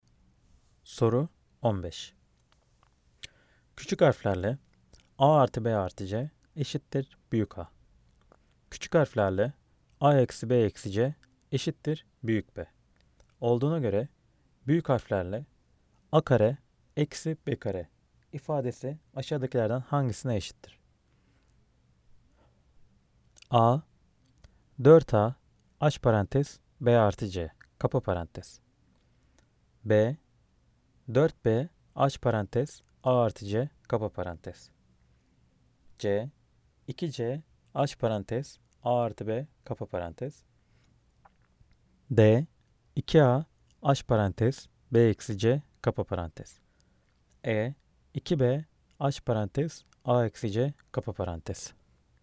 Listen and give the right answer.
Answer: Cevap A 4A aç parantez B artı C kapa parantez.